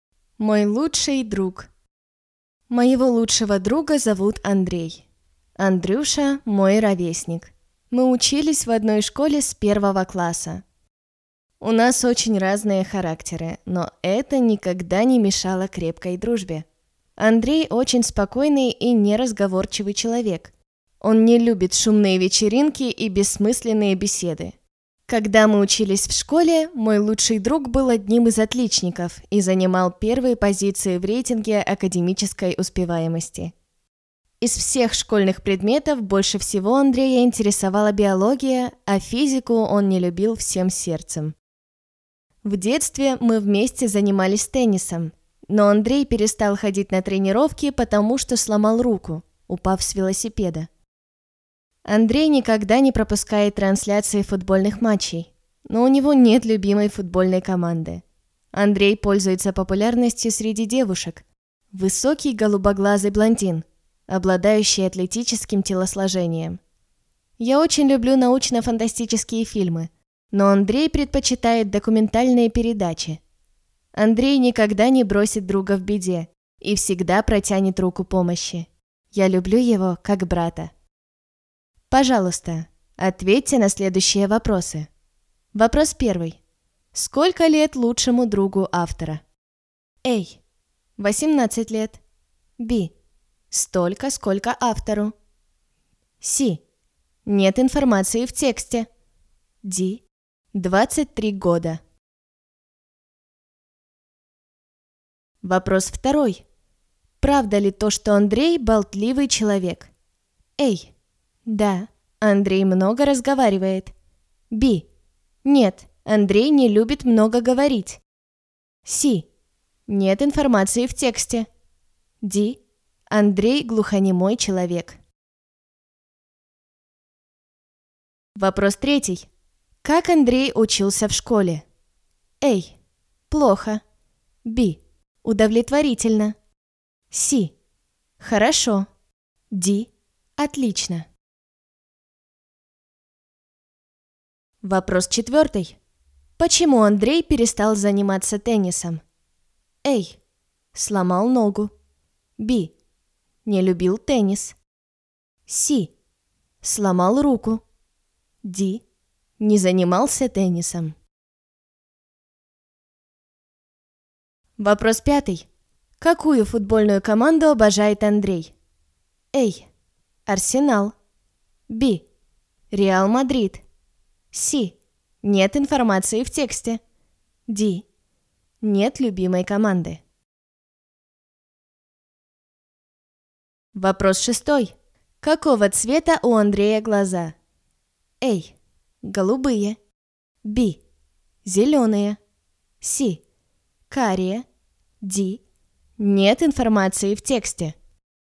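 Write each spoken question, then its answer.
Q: Сколько лет лучшему другу автора?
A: B: Столько, сколько автору.

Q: Правда ли то, что Андрей болтливый человек?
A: Б: Нет, Андрей не любит много говорить.

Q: Как Андрей учился в школе?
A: Д: Отлично.

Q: Почему Андрей перестал заниматься теннисом?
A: С: Сломал руку.

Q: Какую футбольную команду обожает Андрей?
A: Д: Нет любимой команды.

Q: Какого цвета у Андрея глаза?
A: А: Голубые.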